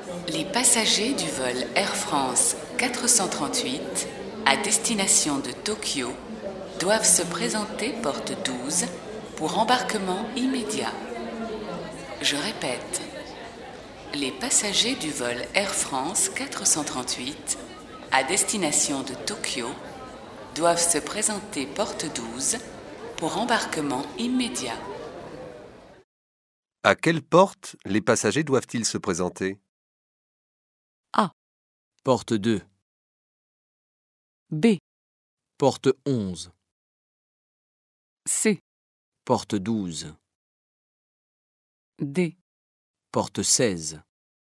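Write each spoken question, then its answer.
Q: À quelle porte les passagers doivent-ils se présenter ?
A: C: Porte 12.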